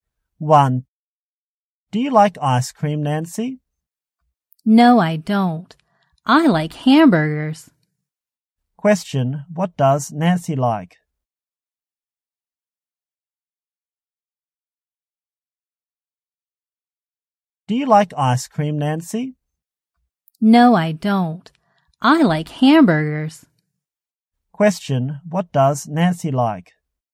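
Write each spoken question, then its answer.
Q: what does Nancy like?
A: Hamburgers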